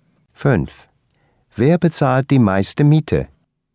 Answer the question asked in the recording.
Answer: Karin bezahlt die meiste Miete.